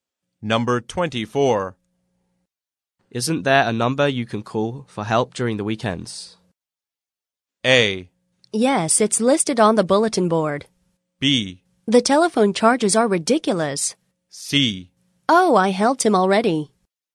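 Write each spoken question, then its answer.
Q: Isn't there a number you can call for help during the weekends?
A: A: Yes, it's listed on the bulletin board.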